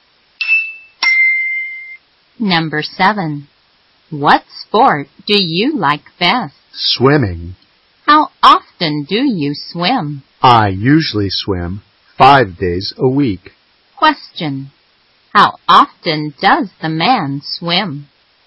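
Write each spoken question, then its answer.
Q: Question. How often does the man swim?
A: 5 days a week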